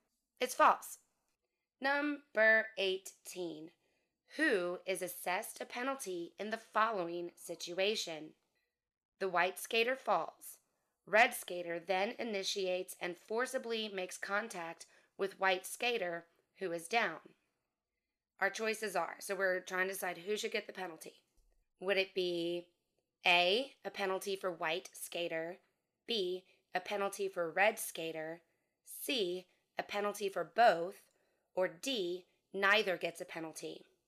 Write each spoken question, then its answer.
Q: Who is assessed a penalty in the following situation?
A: The answer is B, a penalty for red skater.